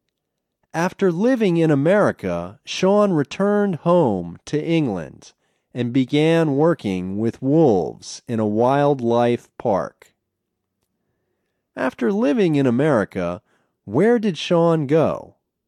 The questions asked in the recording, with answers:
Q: After living in America, where did Sean go?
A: After living in America, Sean returned to England.